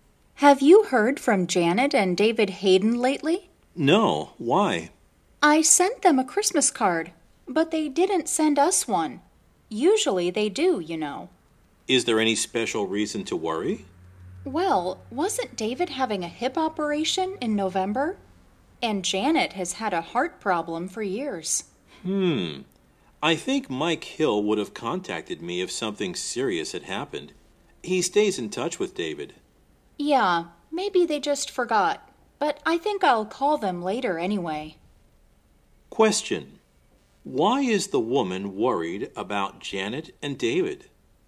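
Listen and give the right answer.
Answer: They didn't send a Christmas card, and they have health problems (David's hip operation, Janet's heart problem).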